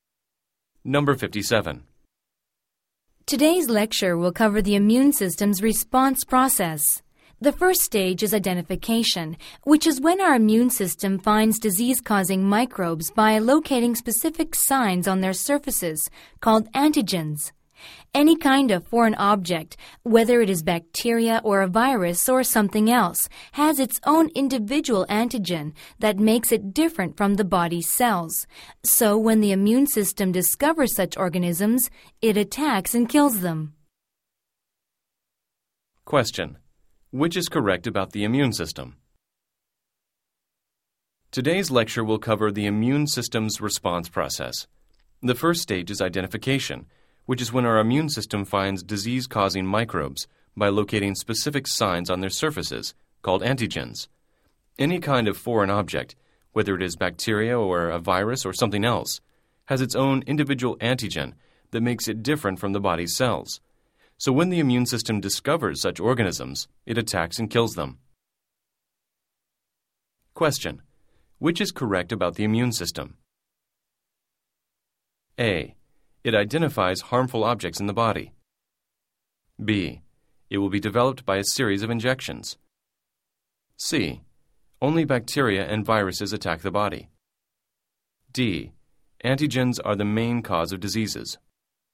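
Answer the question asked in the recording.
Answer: A: It identifies harmful objects in the body.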